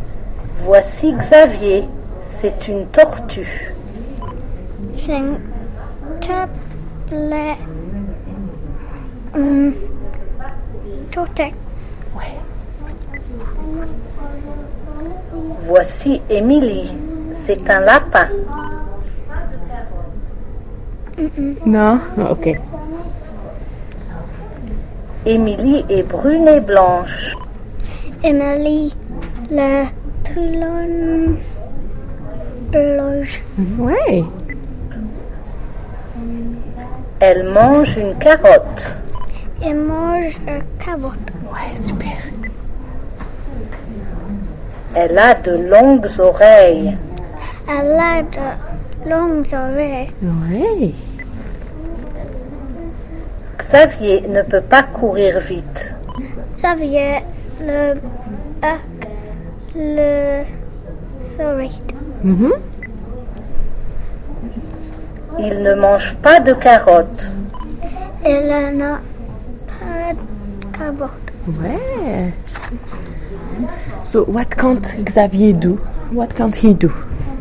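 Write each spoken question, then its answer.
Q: So what can't Xavier do?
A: Run fast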